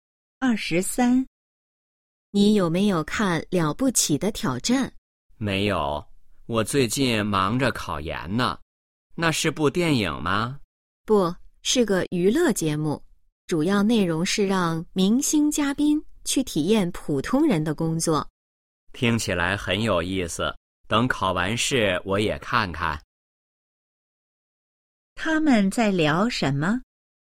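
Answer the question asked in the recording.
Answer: 娱乐节目《了不起的挑战》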